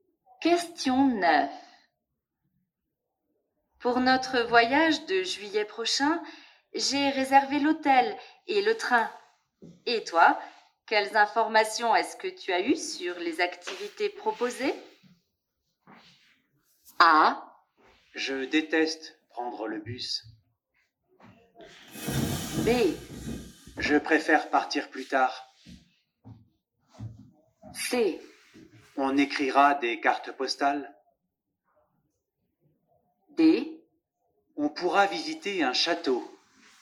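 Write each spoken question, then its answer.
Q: Et toi, quelles informations est-ce que tu as eues sur les activités proposées?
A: D: On pourra visiter un château.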